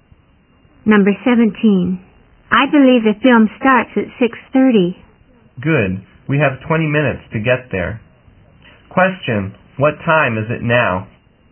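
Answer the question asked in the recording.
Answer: 6:10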